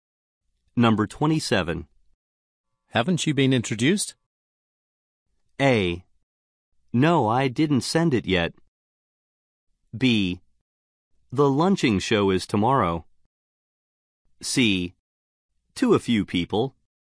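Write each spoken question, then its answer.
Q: Haven't you been introduced?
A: C: To a few people.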